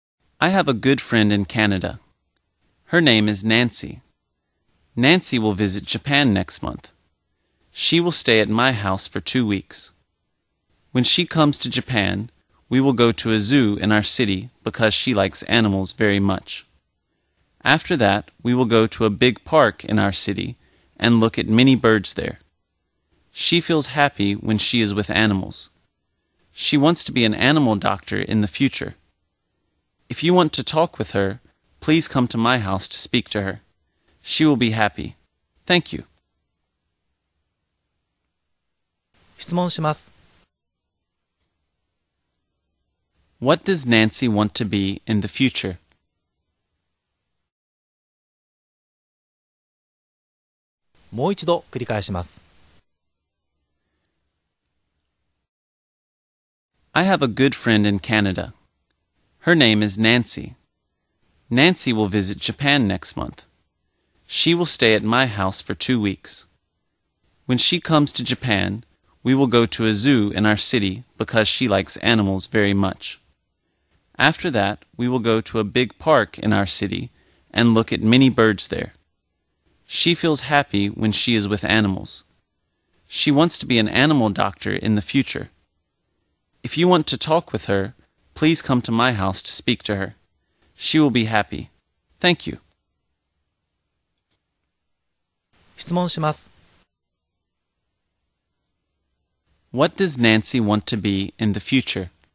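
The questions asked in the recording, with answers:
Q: What does Nancy want to be in the future?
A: An animal doctor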